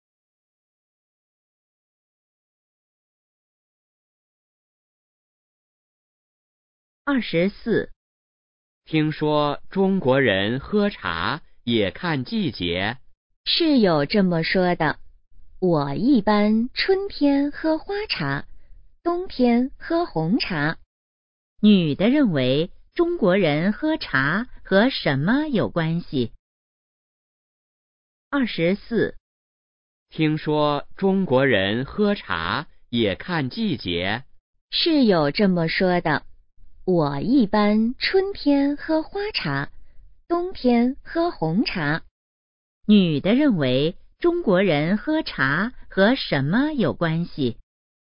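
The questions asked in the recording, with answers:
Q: 女的认为中国人喝茶和什么有关系?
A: 季节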